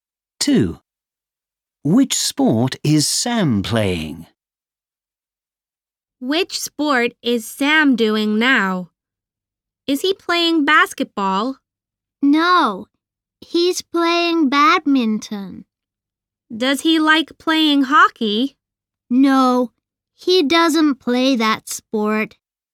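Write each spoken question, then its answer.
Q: Which sport is Sam playing?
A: badminton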